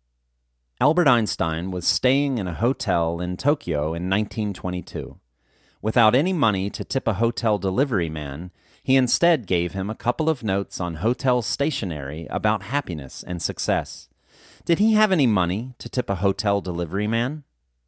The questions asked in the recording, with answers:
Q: Did he have any money to tip a hotel delivery man?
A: No, he didn't have any money to tip a hotel delivery man.